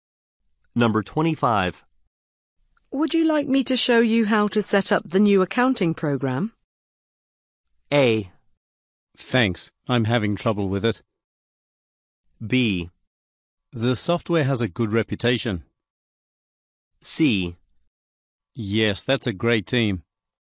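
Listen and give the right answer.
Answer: A: Thanks, I'm having trouble with it.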